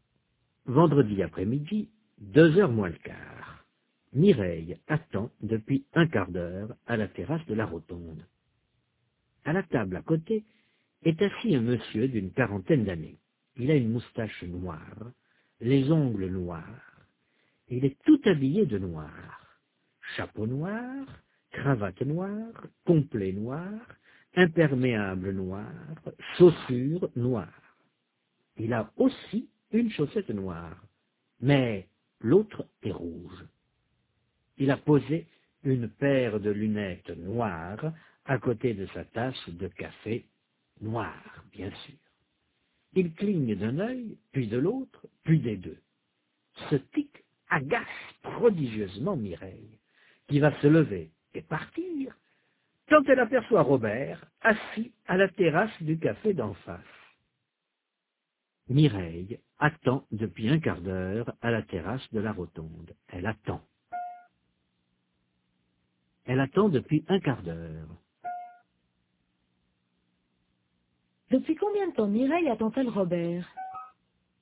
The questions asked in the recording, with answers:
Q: Depuis combien de temps Mireille attend-elle Robert?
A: Depuis un quart d'heure.